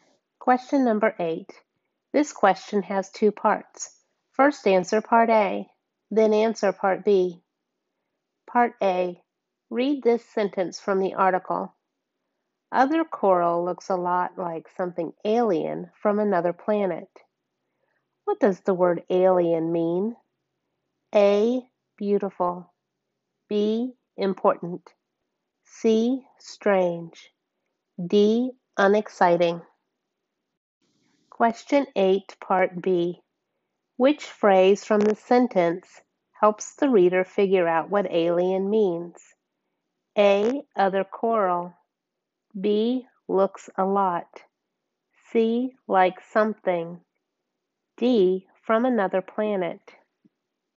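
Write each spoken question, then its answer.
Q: What does the word alien mean?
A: C: Strange

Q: Which phrase from the sentence helps the reader figure out what alien means?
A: D: From another planet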